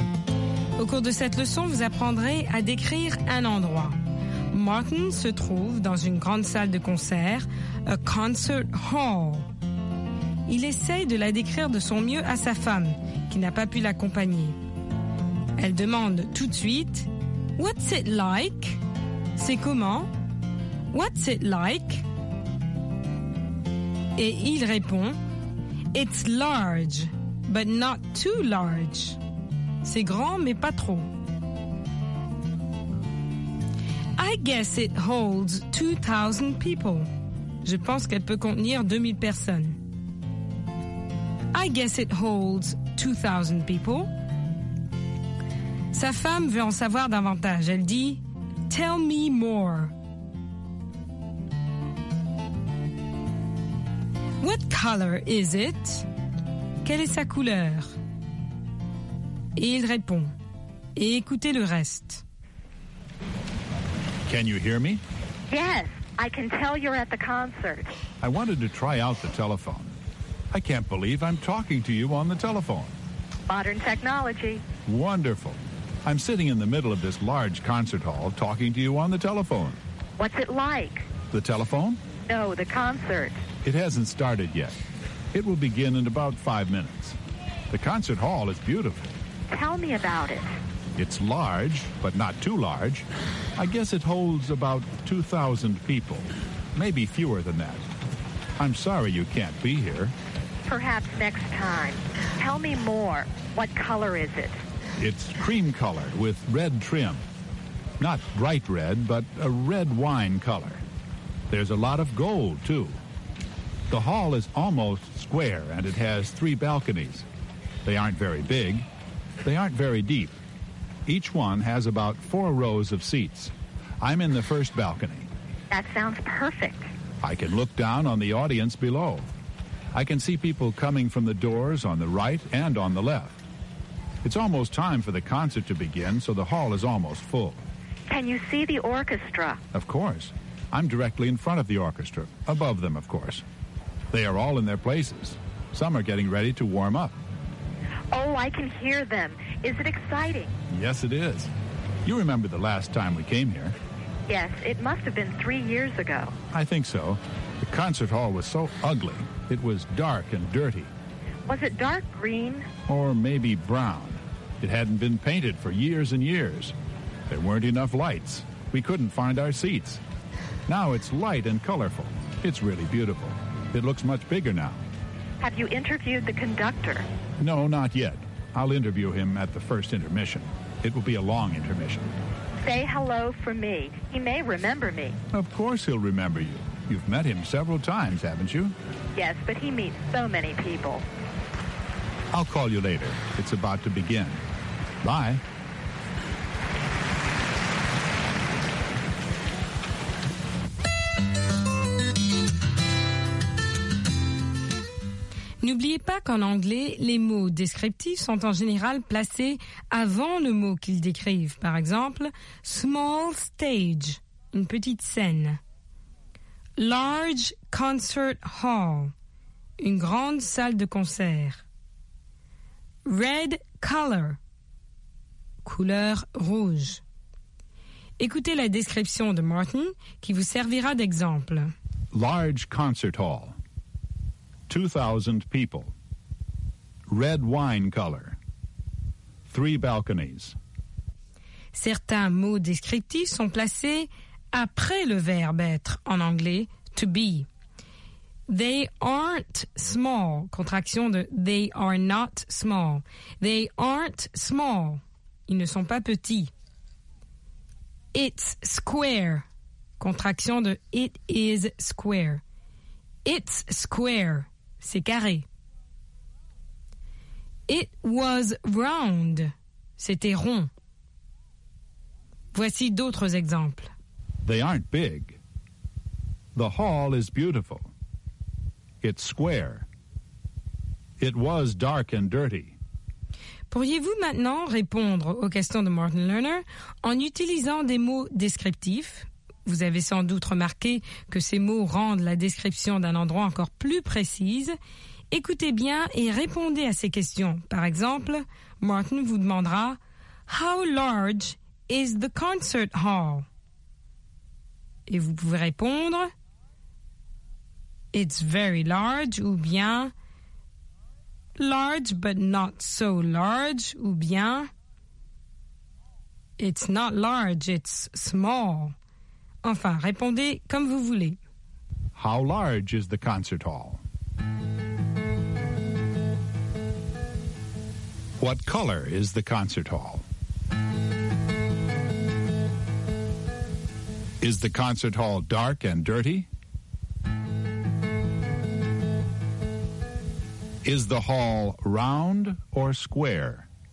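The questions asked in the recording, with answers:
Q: How large is the concert hall?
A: It's large, but not too large (it holds about 2,000 people)

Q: What color is the concert hall?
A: Cream color with red trim

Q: Is the concert hall dark and dirty?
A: No, it's light and colorful now

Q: Is the hall round or square?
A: Square (almost square)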